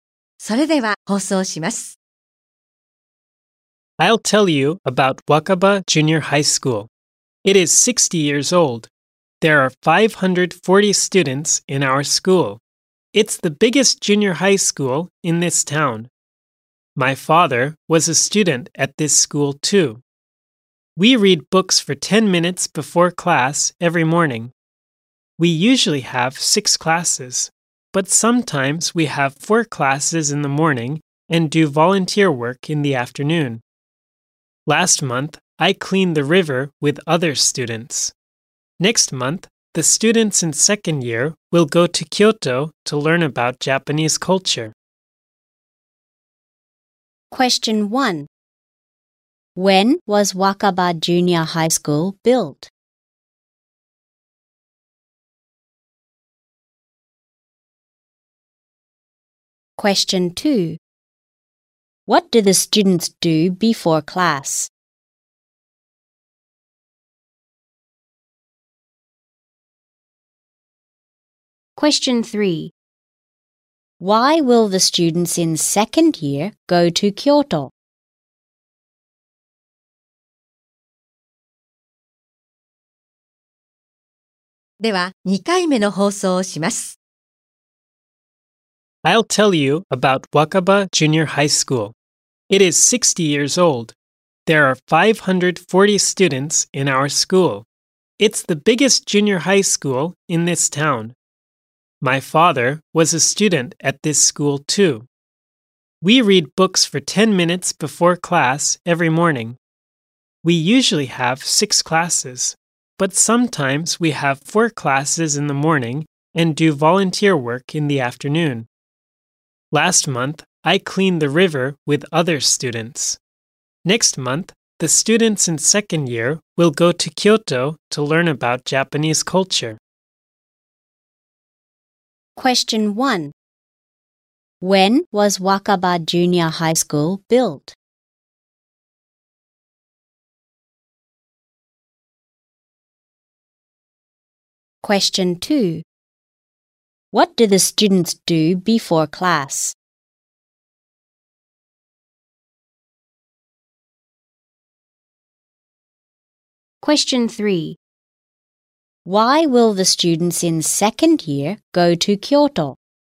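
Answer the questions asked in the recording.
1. 60 years ago
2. They read books for 10 minutes.
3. To learn about Japanese culture.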